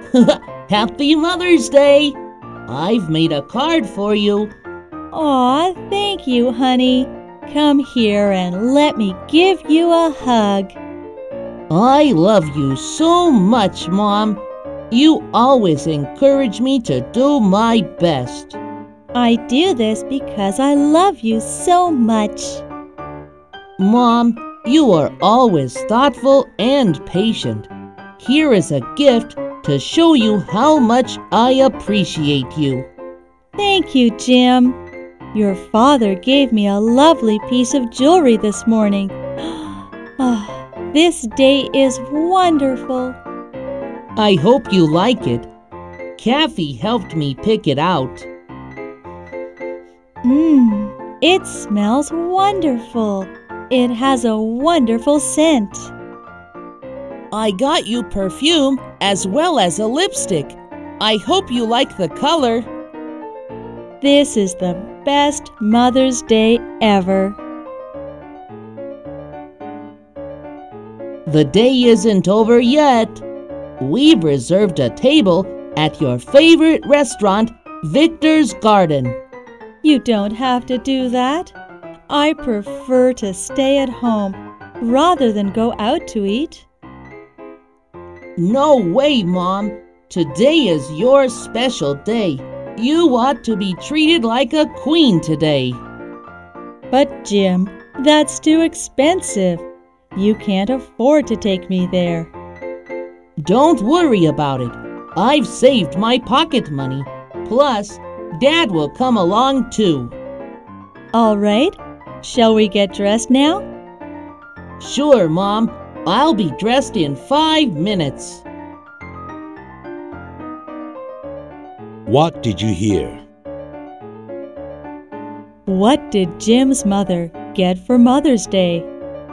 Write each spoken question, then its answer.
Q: What did Jim's mother get for Mother's Day?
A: She got a piece of jewelry, a bottle of perfume, and a lipstick.